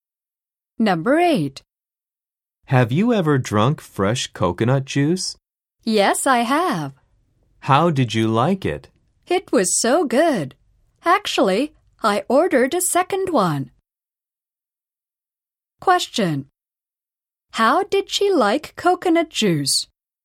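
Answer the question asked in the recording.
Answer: She liked it very much; she ordered a second one.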